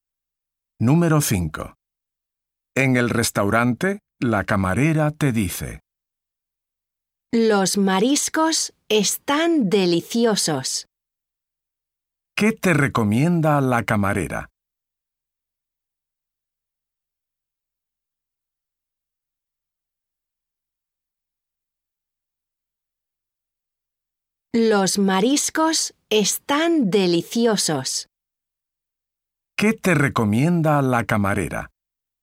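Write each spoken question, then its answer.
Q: ¿Qué te recomienda la camarera?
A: Los mariscos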